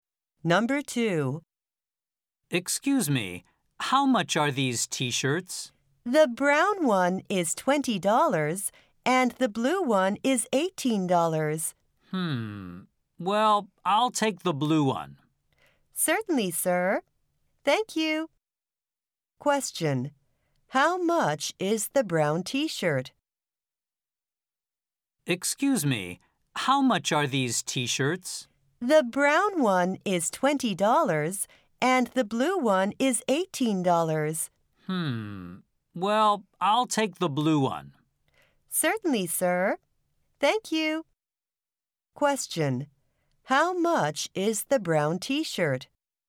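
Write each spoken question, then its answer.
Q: How much is the brown t-shirt?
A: $20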